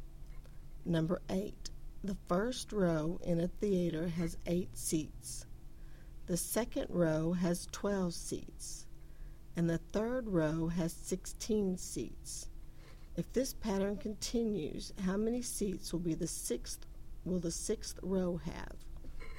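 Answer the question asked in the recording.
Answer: 28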